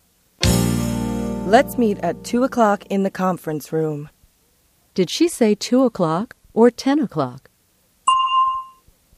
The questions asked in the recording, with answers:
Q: Did she say 2 o'clock or 10 o'clock?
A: She said 2 o'clock.